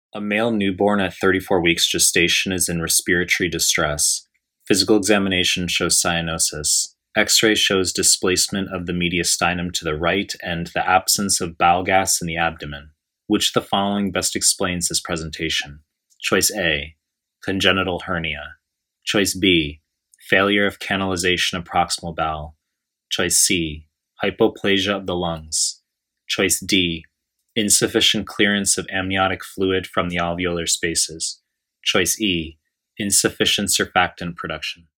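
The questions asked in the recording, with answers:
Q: Which of the following best explains this presentation?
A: A: congenital hernia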